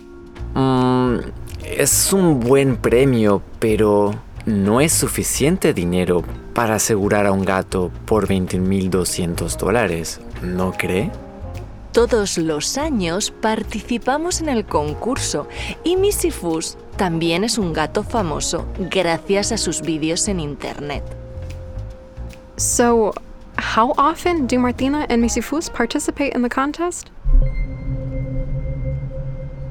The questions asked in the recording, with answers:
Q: So, how often do Martina and Missy Fuss participate in the contest?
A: Sí, they participate todos los años, every year.